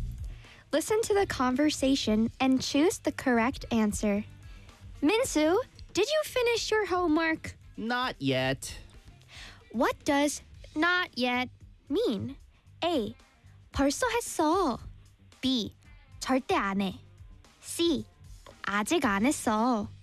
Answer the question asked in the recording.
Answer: C. 아직 안 했어.